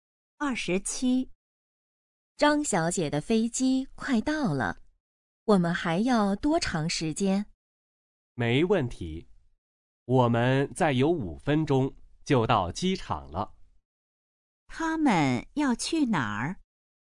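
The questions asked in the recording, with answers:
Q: 他们要去哪儿?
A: 机场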